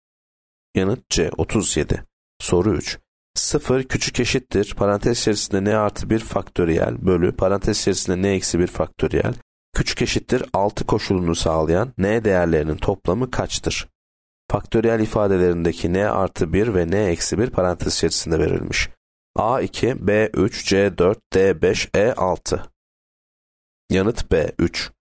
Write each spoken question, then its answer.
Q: 0 küçük eşittir parantez içerisinde n artı 1 faktöriyel bölü parantez içerisinde n eksi 1 faktöriyel küçük eşittir 6 koşulunu sağlayan n değerlerinin toplamı kaçtır?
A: Yanıt B 3.